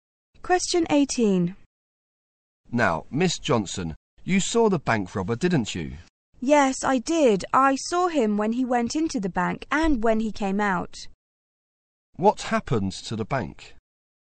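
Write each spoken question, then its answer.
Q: What happened to the bank?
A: It was robbed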